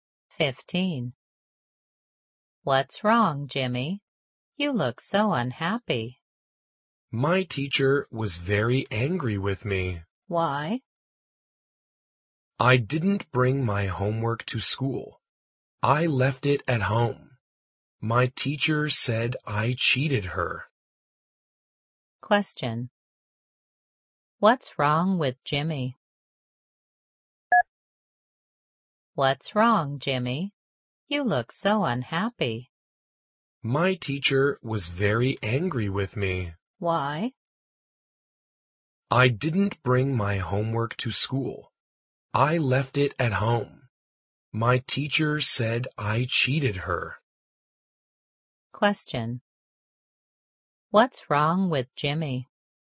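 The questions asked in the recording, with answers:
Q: What's wrong with Jimmy?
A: His teacher was angry with him because he didn't bring his homework to school.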